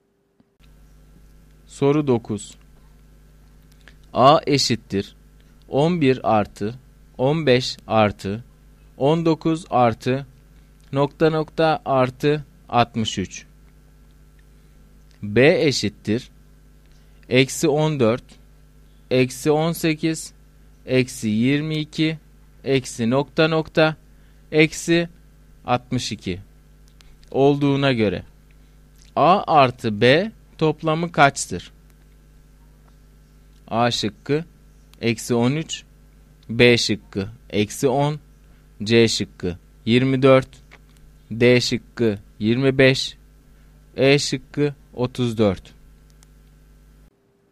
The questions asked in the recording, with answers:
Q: B eşittir eksi 14 eksi 18 eksi 22 eksi nokta nokta eksi 62 olduğuna göre A artı B toplamı kaçtır?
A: Doğru cevap C şıkkı.